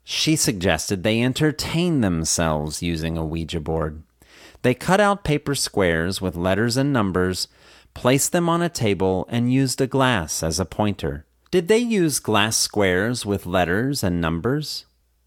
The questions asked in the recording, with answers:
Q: Did they use glass squares with letters and numbers?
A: No, they didn't use glass squares with letters and numbers.